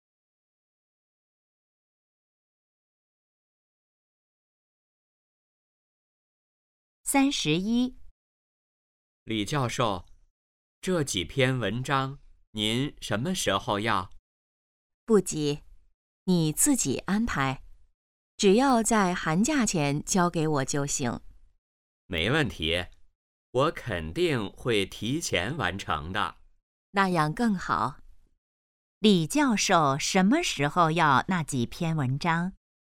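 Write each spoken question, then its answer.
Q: 李教授什么时候要那几篇文章?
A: 寒假前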